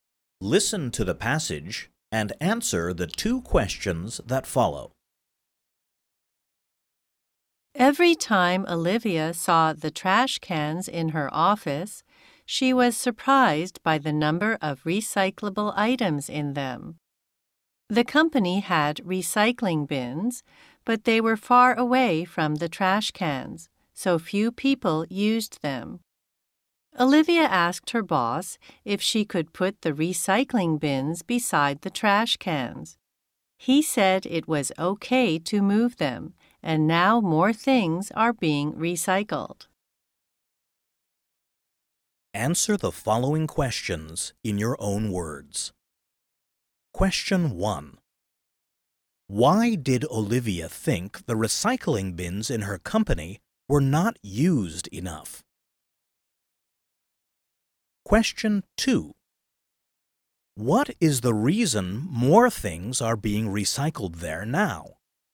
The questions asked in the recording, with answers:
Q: What is the reason more things are being recycled there now?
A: It is because the recycling bins are next to the trash cans.